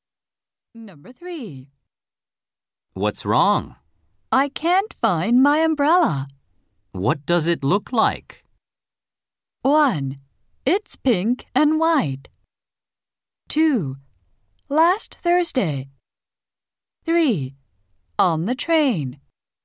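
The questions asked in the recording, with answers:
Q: What does it look like?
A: 1: It's pink and white.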